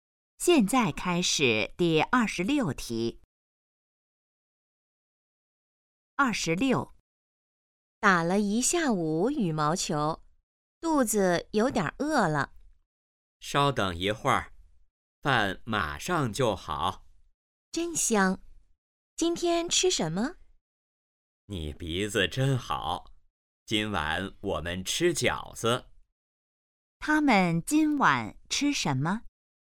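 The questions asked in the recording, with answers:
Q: 他们今晚吃什么?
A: 饺子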